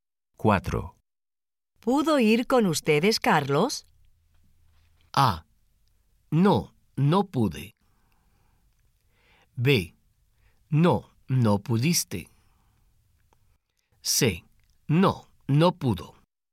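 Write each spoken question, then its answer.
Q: ¿Pudo ir con ustedes, Carlos?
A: C: No, no pudo.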